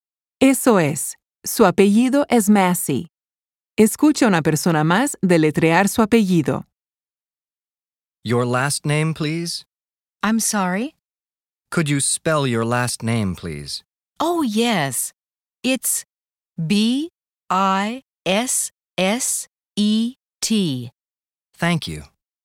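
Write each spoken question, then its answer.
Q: ¿Cuál era el apellido de esta señora?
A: Bisset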